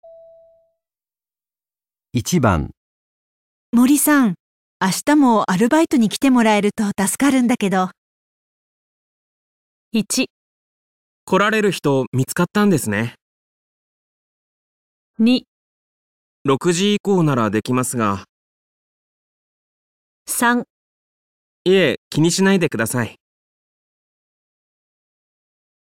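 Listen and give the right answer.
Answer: 6時以降ならできますが

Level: N2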